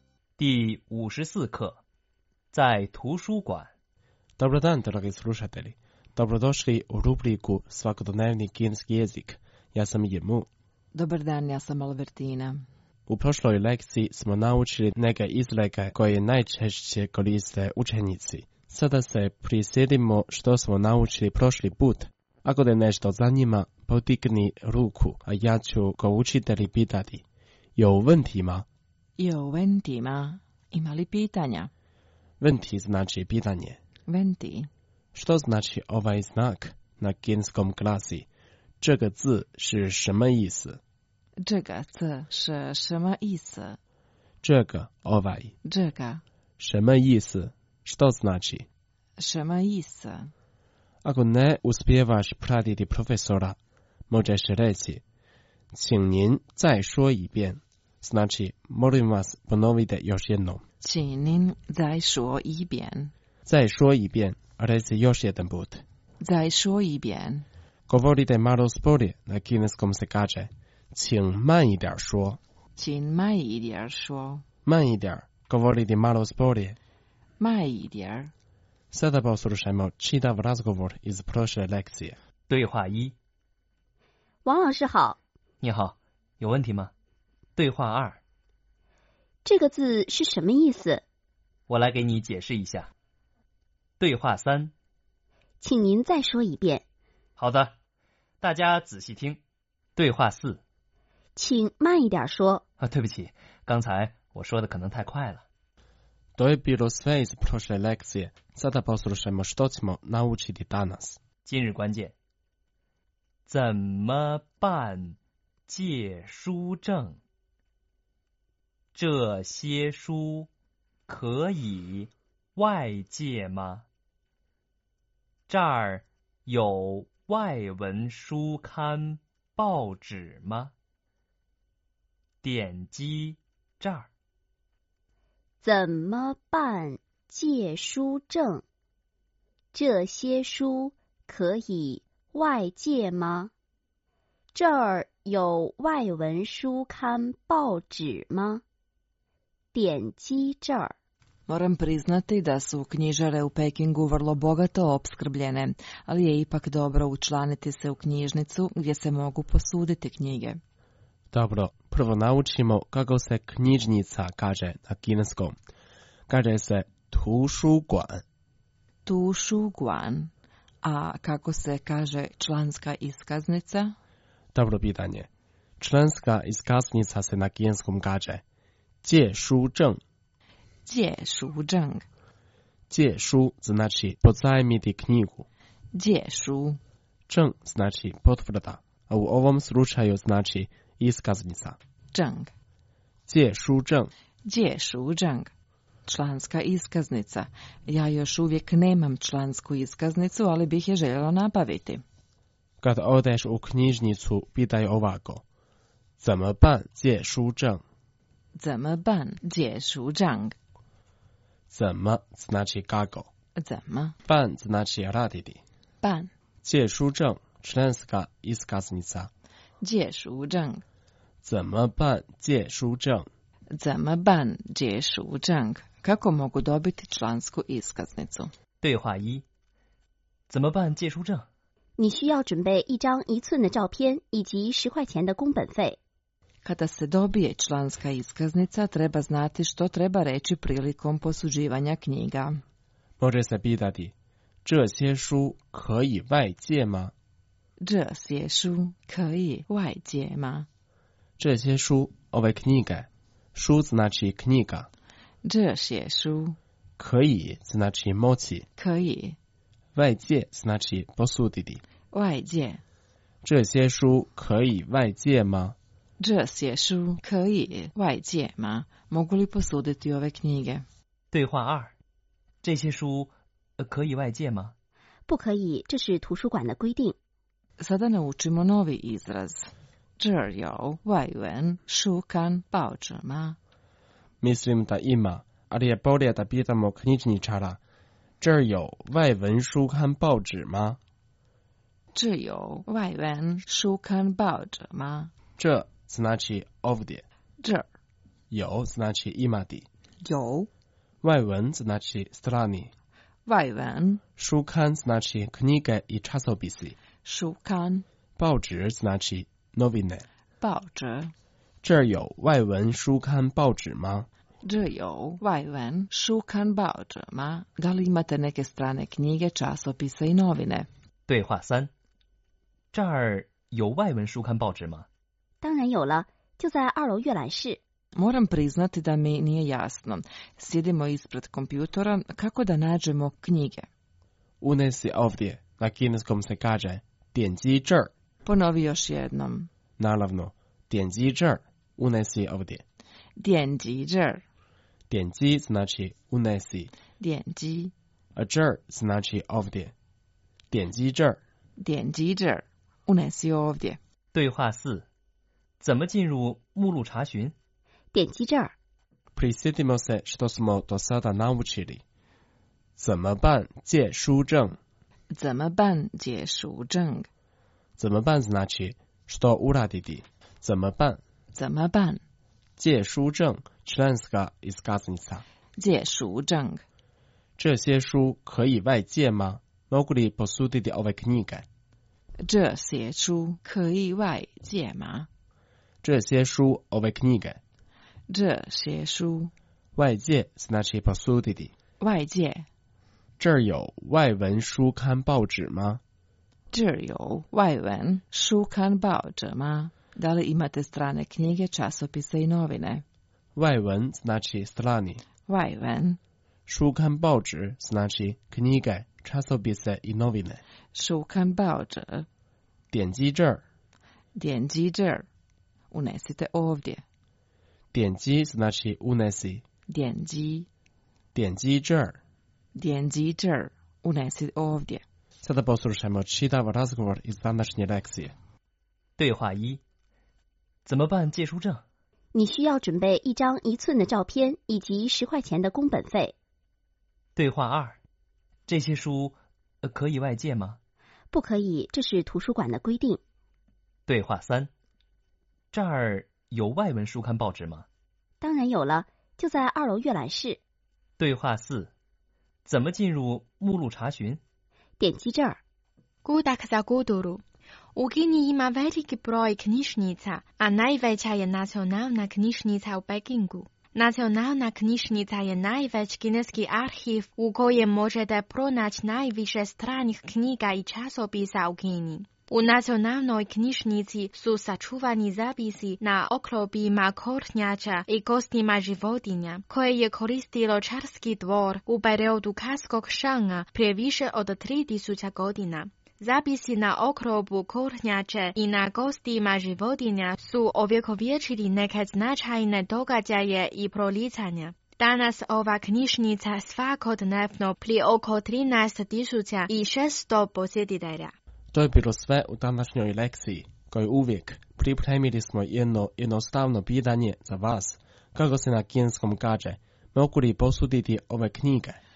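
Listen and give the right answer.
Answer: 这些书可以外借吗?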